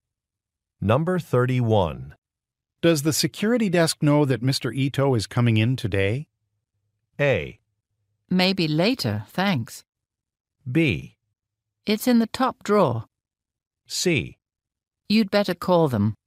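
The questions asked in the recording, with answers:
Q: Does the security desk know that Mr. Ito is coming in today?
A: C: You'd better call them.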